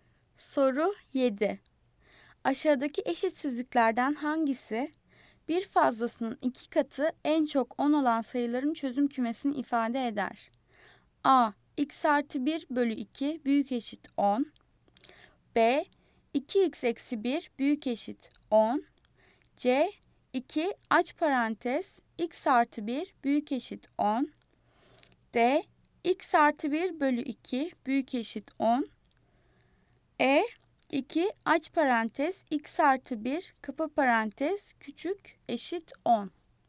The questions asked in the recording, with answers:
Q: Aşağıdaki eşitsizliklerden hangisi bir fazlasının iki katı en çok 10 olan sayıların çözüm kümesini ifade eder?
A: Cevap E. 2 aç parantez x artı 1 kapa parantez küçük eşit 10.